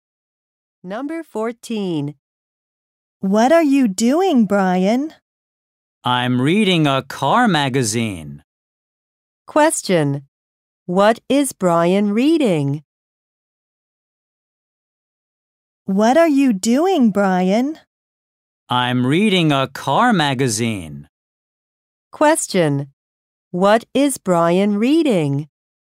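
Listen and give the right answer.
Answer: A car magazine.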